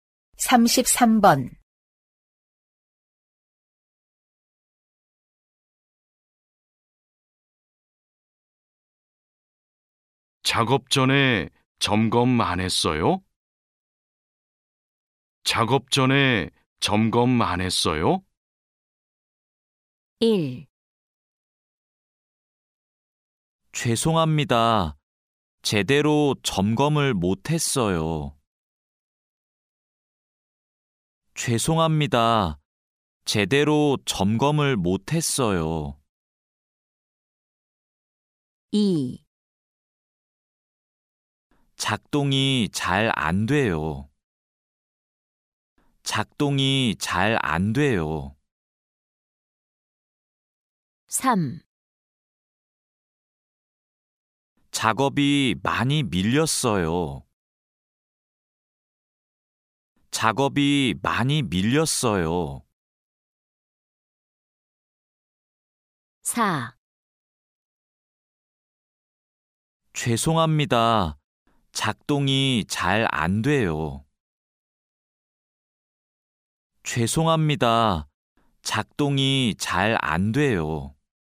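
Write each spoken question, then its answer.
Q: 작업 전에 점검 안 했어요?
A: 1: 죄송합니다. 제대로 점검을 못 했어요.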